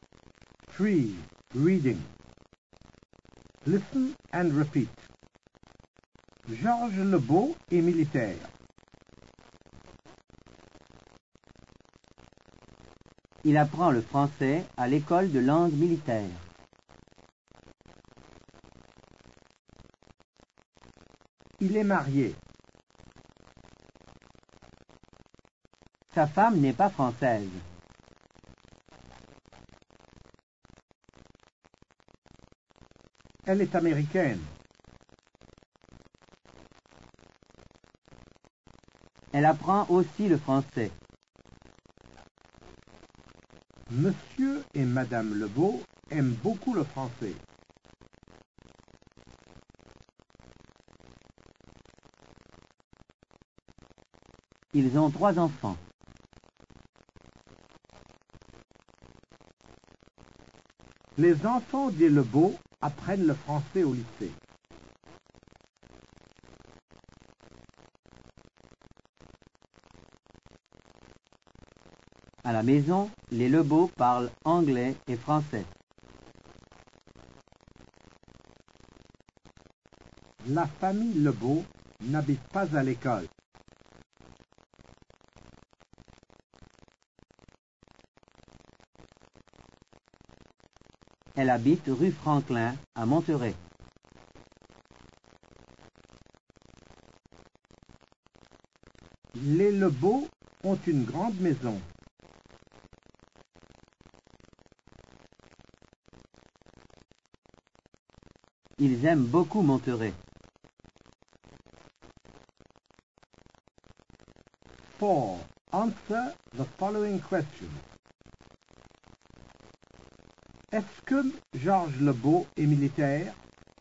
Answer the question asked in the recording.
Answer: Oui, Georges Lebeau est militaire.